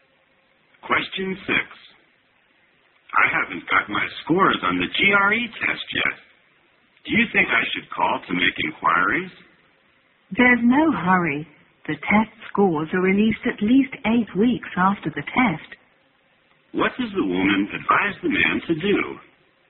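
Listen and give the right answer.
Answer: Wait patiently for the scores, because they come out at least 8 weeks after the test.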